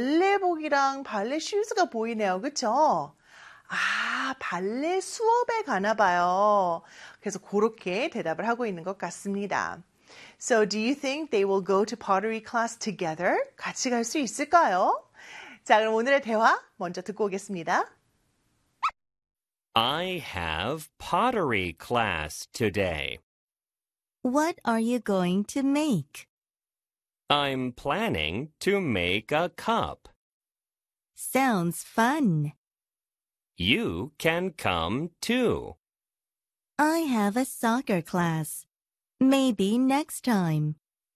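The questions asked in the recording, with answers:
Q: So do you think they will go to pottery class together?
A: No, the girl has soccer class (maybe next time).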